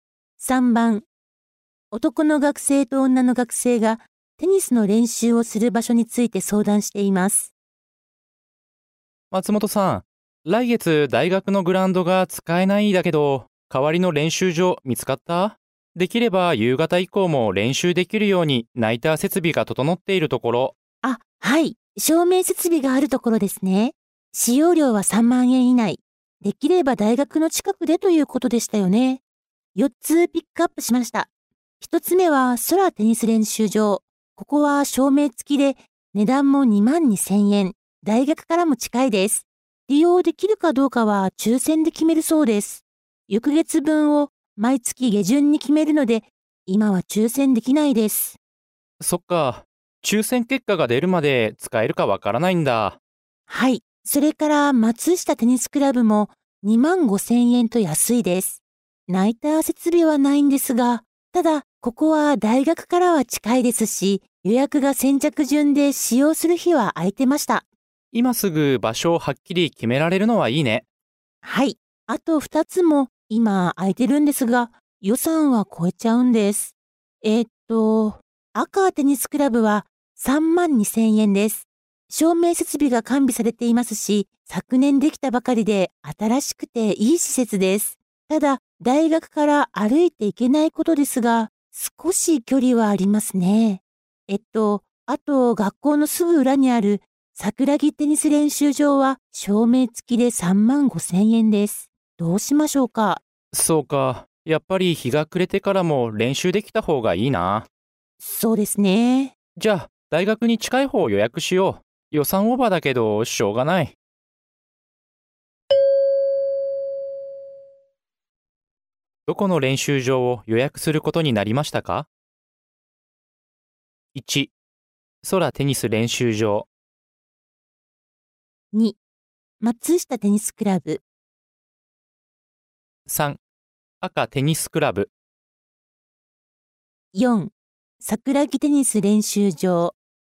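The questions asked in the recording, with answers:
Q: どこの練習場を予約することになりましたか?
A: 4: 桜木テニス練習場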